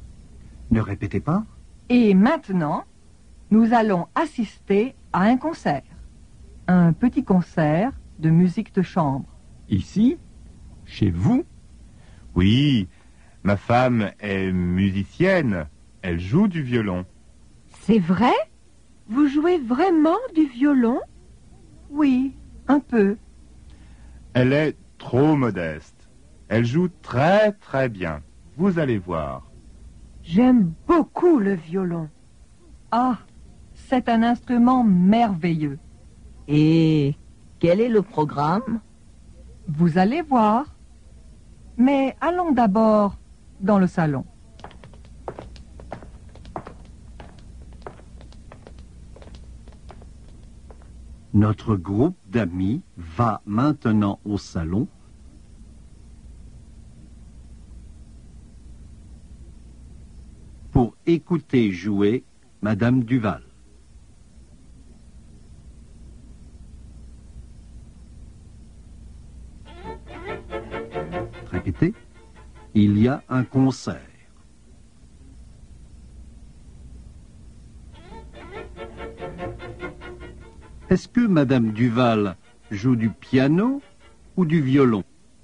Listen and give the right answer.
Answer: Elle joue du violon.